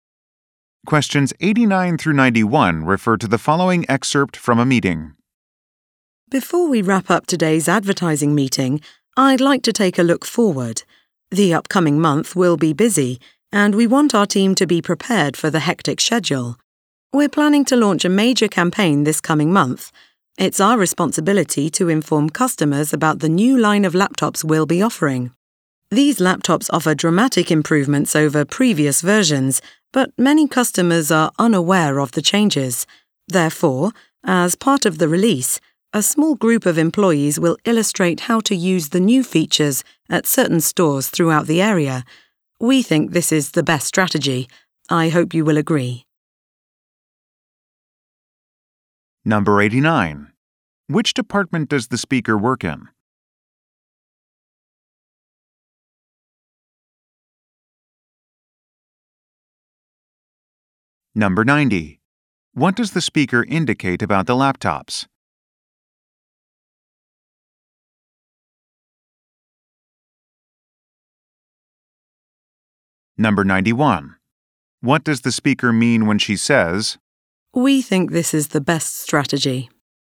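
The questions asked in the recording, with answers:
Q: Which department does the speaker work in?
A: Advertising

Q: What does the speaker indicate about the laptops?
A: They are much improved, but many customers don't know about the changes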